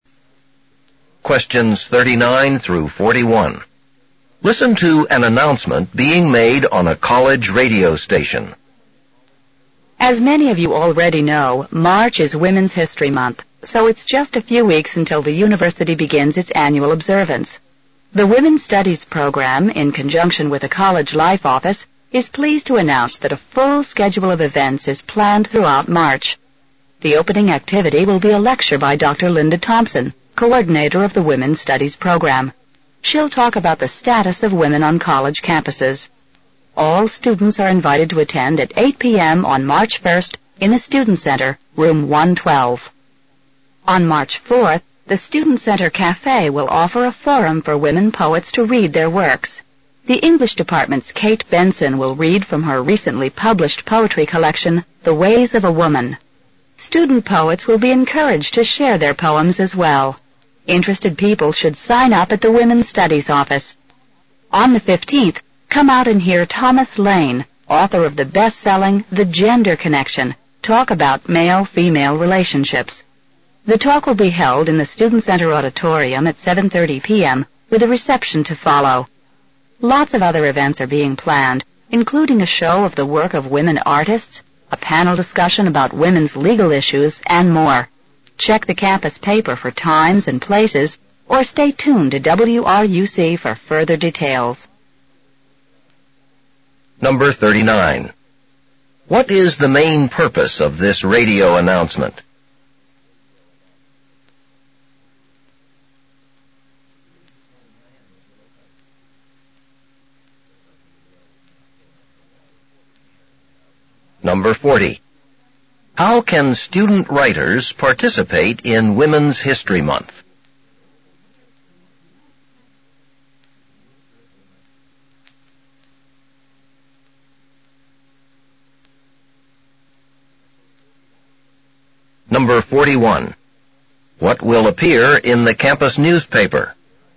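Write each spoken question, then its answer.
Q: What is the main purpose of this radio announcement?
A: To announce events planned for Women's History Month

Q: How can student writers participate in Women's History Month?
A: By signing up at the Women's Studies office to read their poems at the Student Center Cafe forum on March 4th

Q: What will appear in the campus newspaper?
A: Times and places of other Women's History Month events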